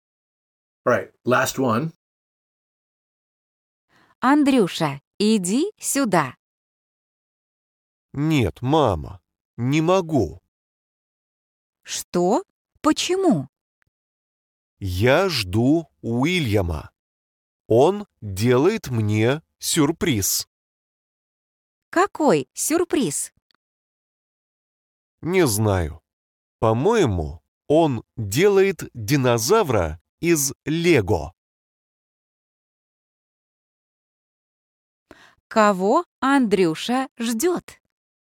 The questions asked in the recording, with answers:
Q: Кого Андрюша ждет?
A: Уильяма.